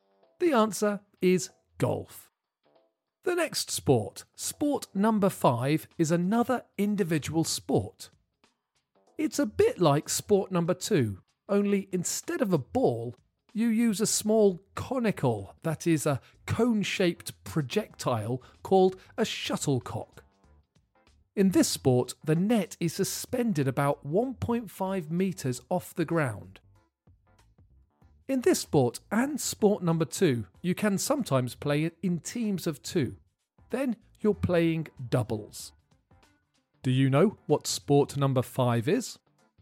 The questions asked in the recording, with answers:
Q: Do you know what sport number five is?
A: The answer is badminton.